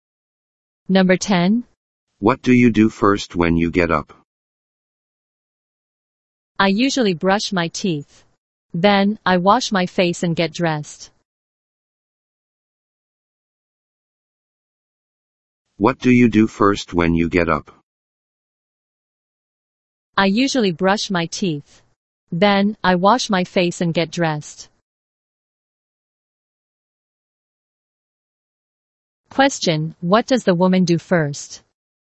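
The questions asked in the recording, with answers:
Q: Question, what does the woman do first?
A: She brushes her teeth.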